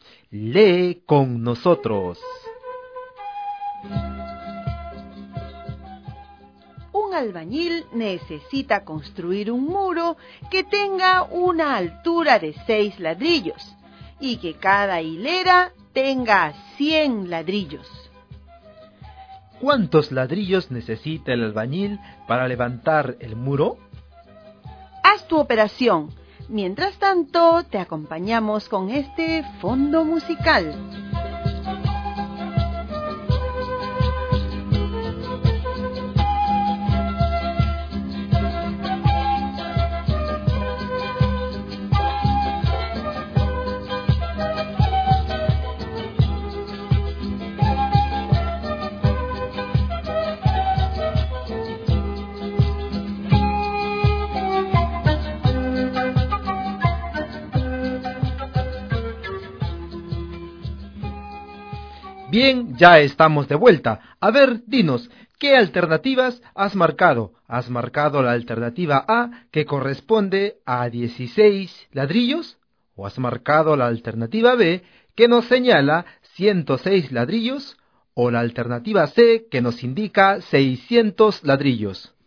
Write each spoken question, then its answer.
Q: ¿Cuántos ladrillos necesita el albañil para levantar el muro?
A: la letra C.